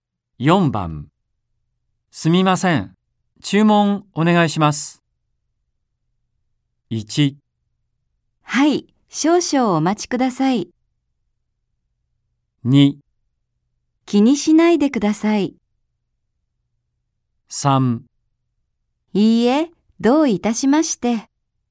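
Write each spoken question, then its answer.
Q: すみません。注文お願いします。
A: 1: はい、少々お待ちください。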